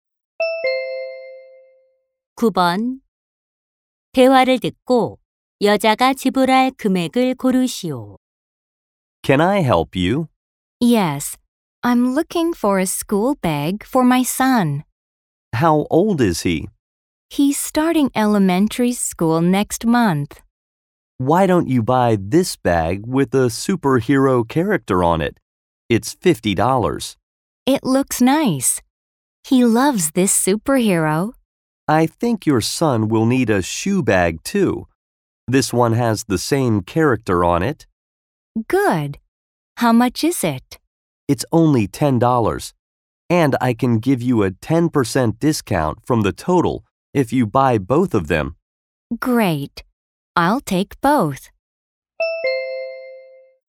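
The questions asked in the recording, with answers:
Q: 대화를 듣고 여자가 지불할 금액을 고르시오.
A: $54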